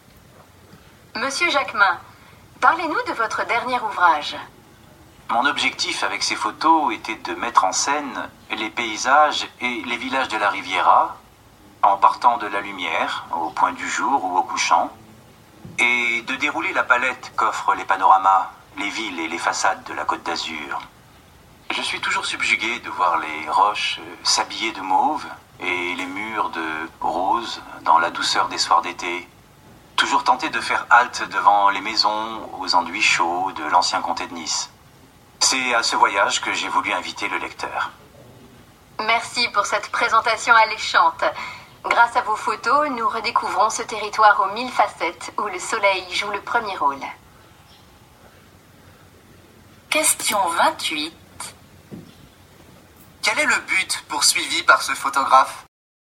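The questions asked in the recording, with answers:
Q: Quel est le but poursuivi par ce photographe?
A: Montrer les paysages et villages de la Côte d'Azur à travers la lumière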